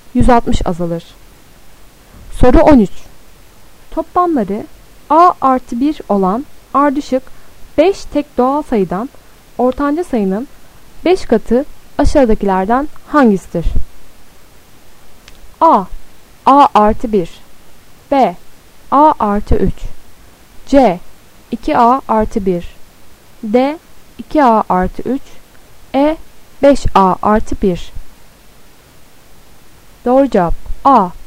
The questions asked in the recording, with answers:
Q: Toplamları A artı 1 olan ardışık 5 tek doğal sayıdan ortanca sayının 5 katı aşağıdakilerden hangisidir?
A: Doğru cevap A.